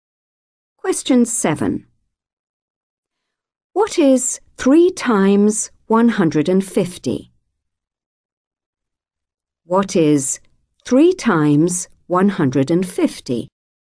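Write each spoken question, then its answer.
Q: What is 3 times 150?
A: 450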